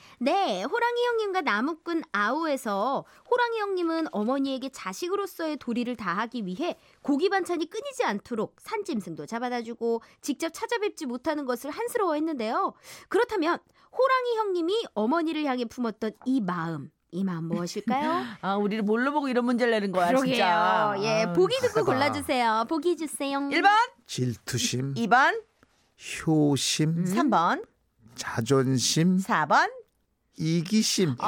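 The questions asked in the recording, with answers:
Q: 그렇다면 호랑이 형님이 어머니를 향해 품었던 이 마음 이 마음 무엇일까요?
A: 2: 효심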